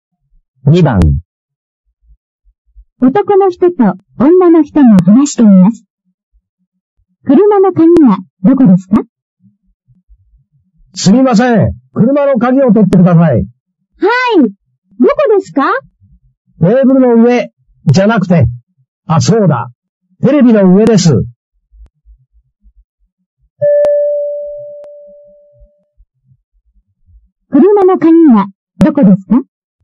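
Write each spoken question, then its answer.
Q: 車の鍵はどこですか?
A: テレビの上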